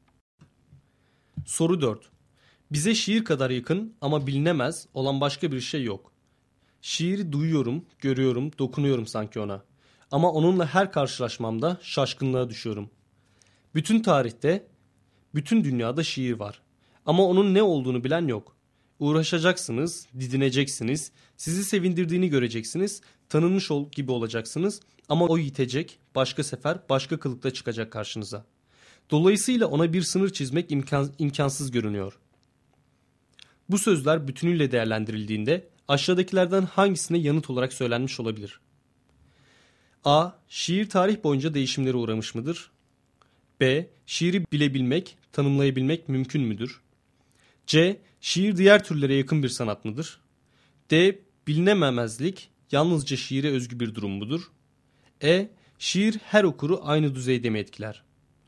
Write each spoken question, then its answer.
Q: Bu sözler bütünüyle değerlendirildiğinde aşağıdakilerden hangisine yanıt olarak söylenmiş olabilir?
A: Doğru cevap B şıkkı.